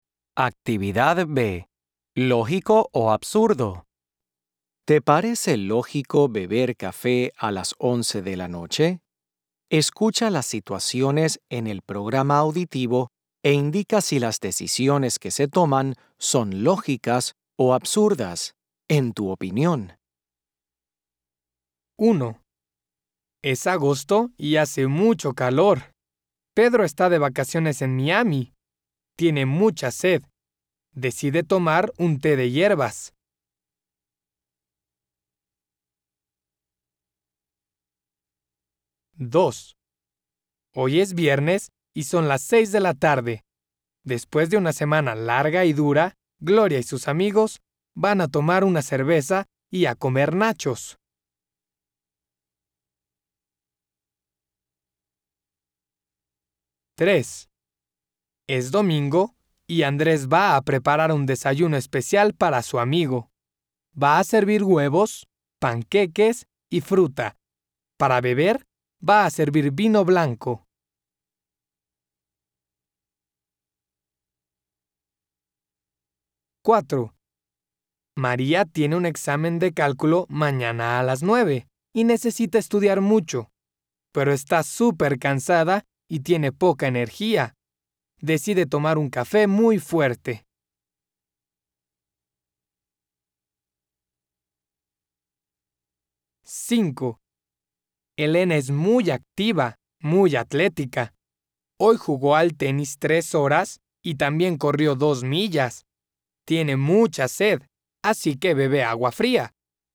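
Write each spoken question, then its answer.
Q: Tiene mucha sed, así que bebe agua fría.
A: lógico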